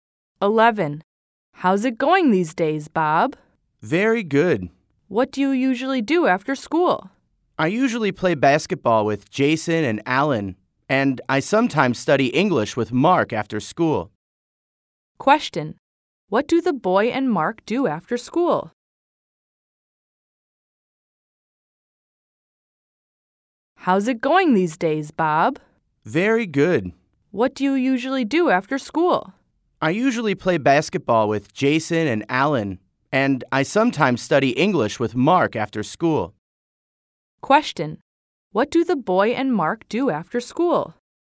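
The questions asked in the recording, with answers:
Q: What do the boy and Mark do after school?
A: They study English.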